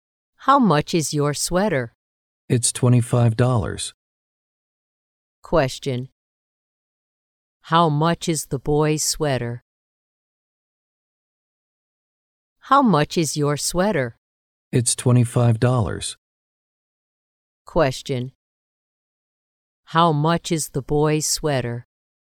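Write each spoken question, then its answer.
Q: How much is the boy's sweater?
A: $25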